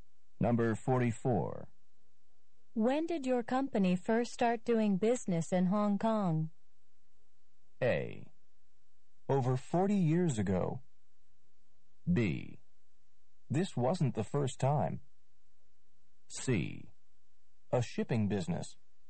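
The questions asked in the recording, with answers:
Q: When did your company first start doing business in Hong Kong?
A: A: Over 40 years ago.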